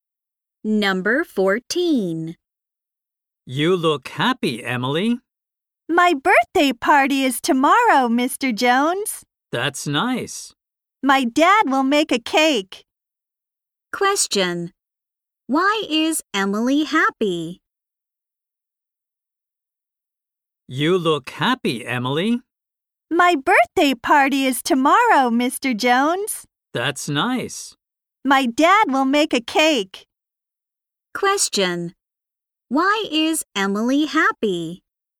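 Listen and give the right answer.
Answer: Her birthday party is tomorrow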